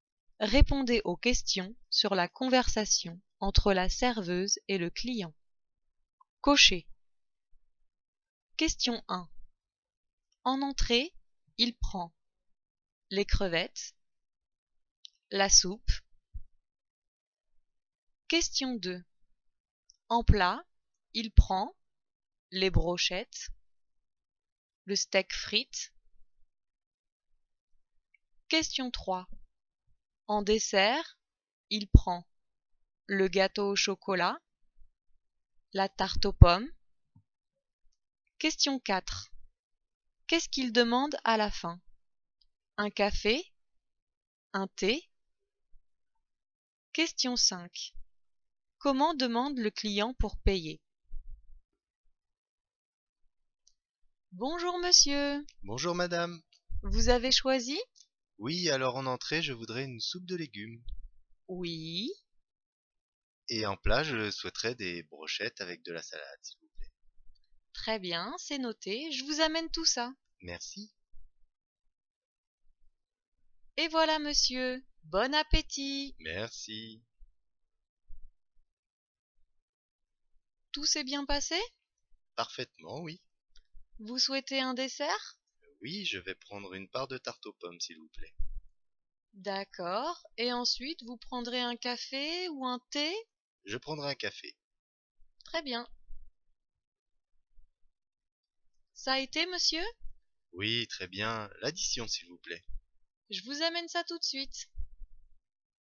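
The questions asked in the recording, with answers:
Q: En entrée, il prend les crevettes, la soupe.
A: la soupe

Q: En plat, il prend les brochettes, le steak frites.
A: les brochettes

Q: En dessert, il prend le gâteau au chocolat, la tarte aux pommes.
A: la tarte aux pommes

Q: Qu'est-ce qu'il demande à la fin? Un café? Un thé?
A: un café

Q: Comment demande le client pour payer?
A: L'addition, s'il vous plaît.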